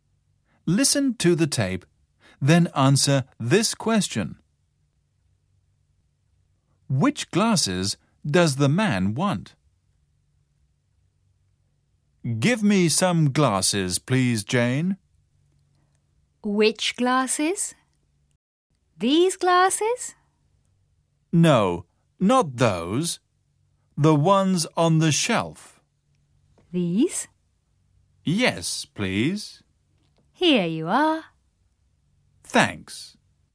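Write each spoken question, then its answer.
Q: Which glasses does the man want?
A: The ones on the shelf.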